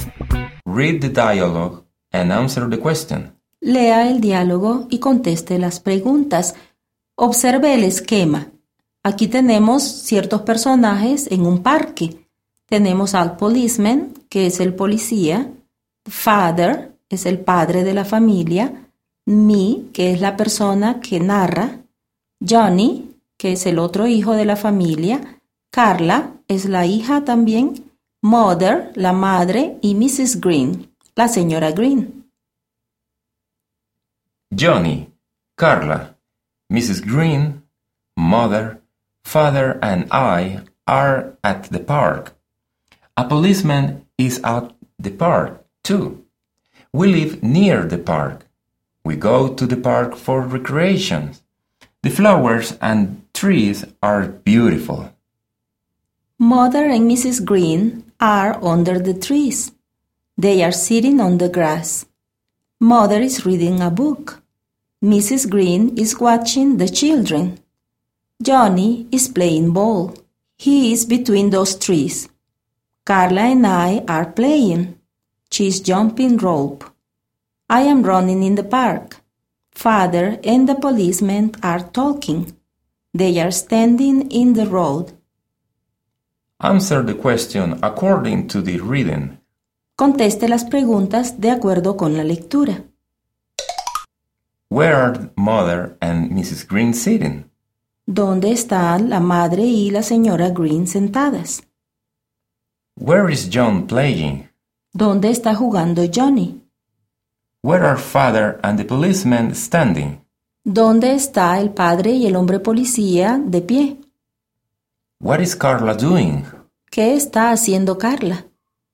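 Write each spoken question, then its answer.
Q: Where are Mother and Mrs. Green sitting?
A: On the grass, under the trees.

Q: Where is John playing?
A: Between those trees.

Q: Where are Father and the policeman standing?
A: In the road.

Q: What is Carla doing?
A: She is jumping rope.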